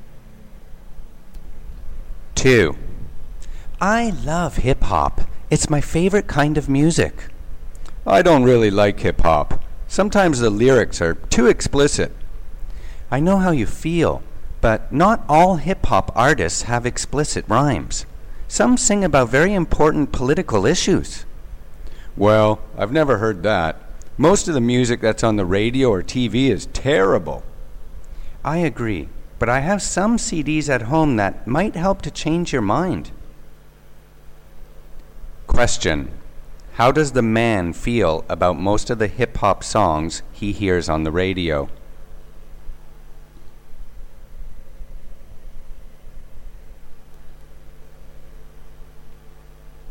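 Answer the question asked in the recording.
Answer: He thinks they are terrible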